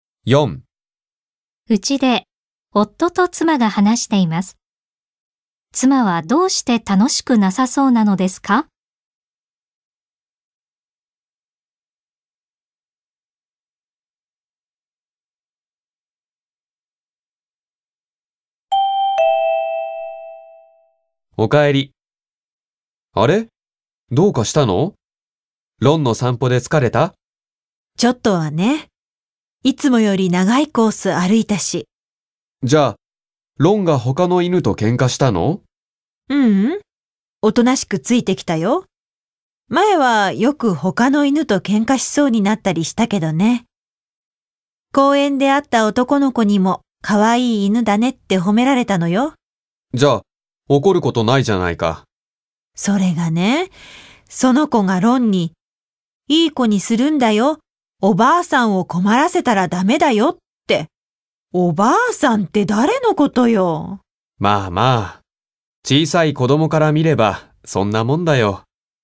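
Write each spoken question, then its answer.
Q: 妻はどうして楽しくなさそうなのですか?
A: 公園で会った男の子に「おばあさん」と呼ばれたから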